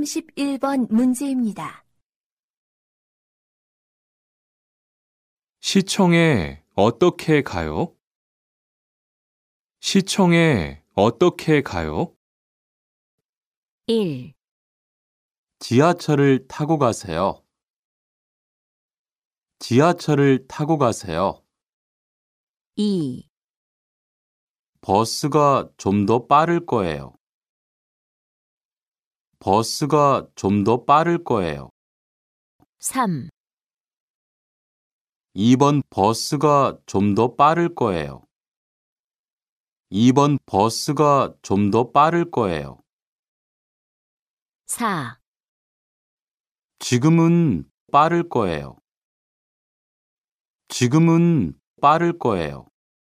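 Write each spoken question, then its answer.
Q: 시청에 어떻게 가요?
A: 1: 지하철을 타고 가세요.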